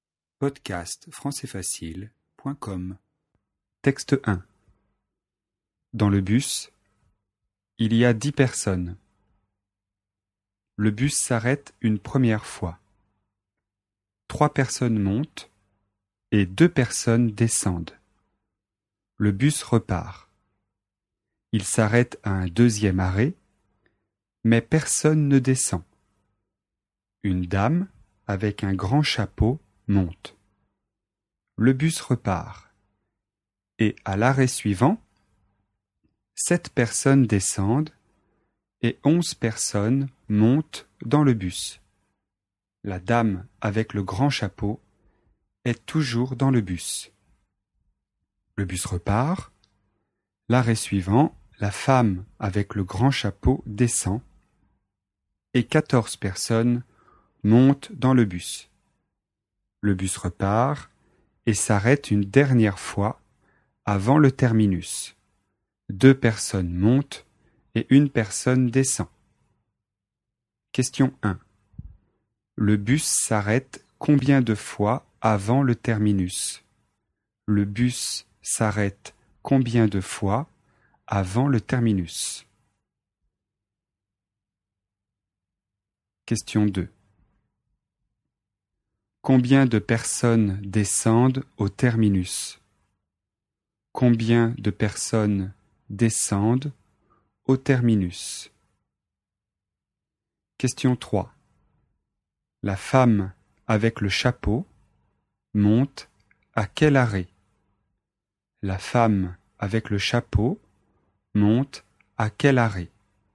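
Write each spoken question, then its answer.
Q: Le bus s'arrête combien de fois avant le terminus?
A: 5 fois

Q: Combien de personnes descendent au terminus?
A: 30 personnes

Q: La femme avec le chapeau monte à quel arrêt?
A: Au deuxième arrêt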